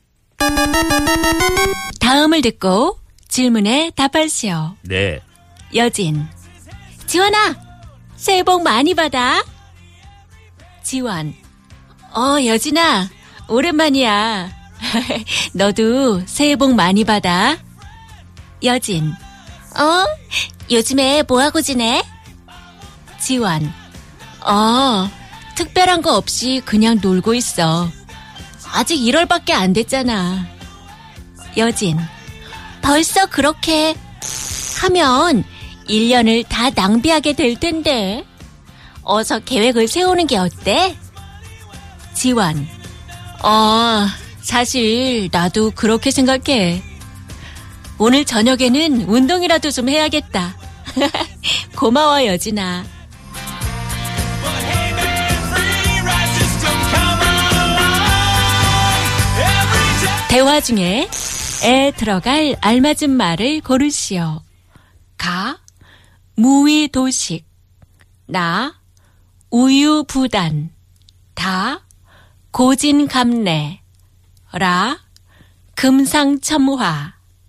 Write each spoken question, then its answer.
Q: 대화 중에 에 들어갈 알맞은 말을 고르시오.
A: And the correct answer was